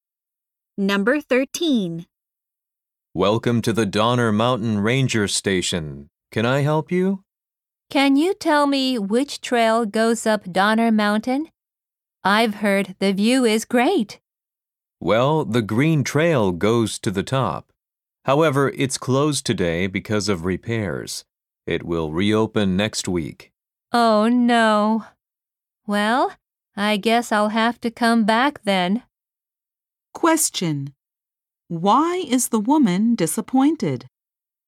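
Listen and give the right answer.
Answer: The trail up the mountain is closed today for repairs.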